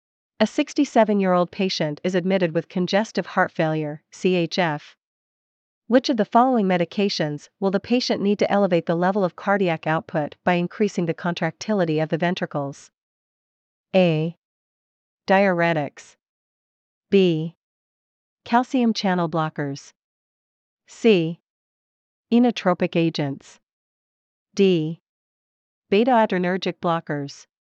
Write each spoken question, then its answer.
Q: Which of the following medications will the patient need to elevate the level of cardiac output by increasing the contractility of the ventricles?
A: Answer C.